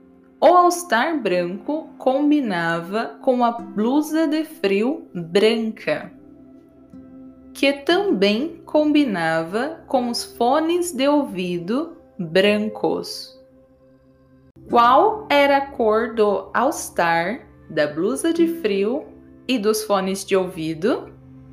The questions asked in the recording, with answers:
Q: Qual era a cor do all-star, da blusa de frio e dos fones de ouvido?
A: Brancos. O all-star a blusa de frio e os fones de ouvido eram brancos.